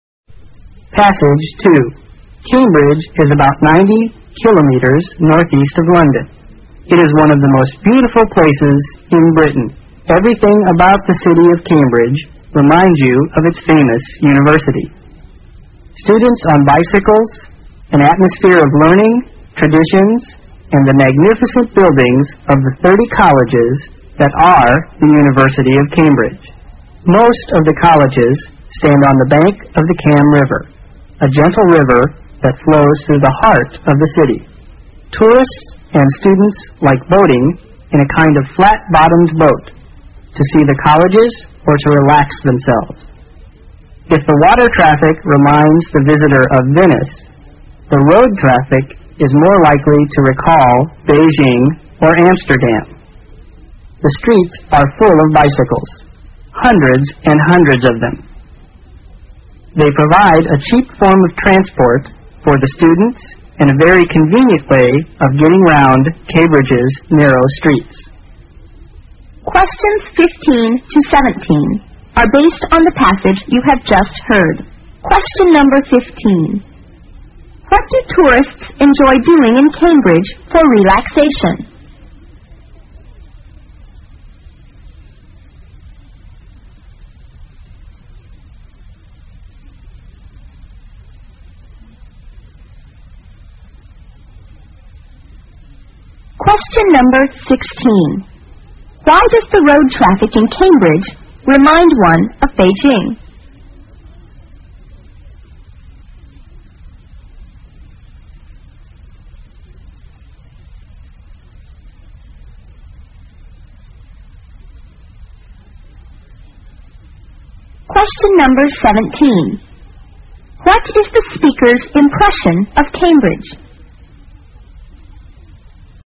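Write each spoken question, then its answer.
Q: What do tourists enjoy doing in Cambridge for relaxation?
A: Boating in a flat-bottomed boat on the Cam River

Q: Why does the road traffic in Cambridge remind one of Beijing?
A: The streets are full of bicycles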